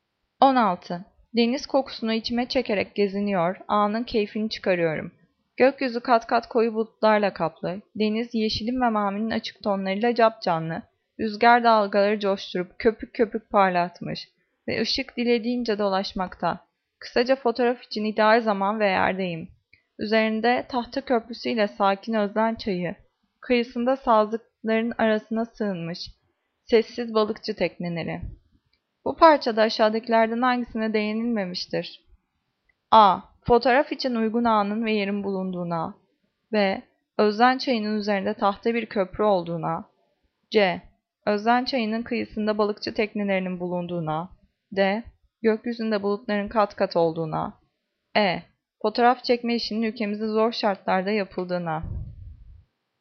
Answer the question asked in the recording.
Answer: Cevap E. Fotoğraf çekme işinin ülkemizde zor şartlarda yapıldığına.